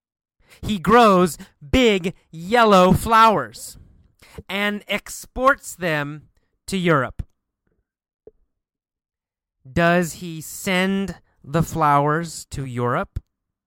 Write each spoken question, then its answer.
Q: Does he send the flowers to Europe?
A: Yes, he exports them to Europe.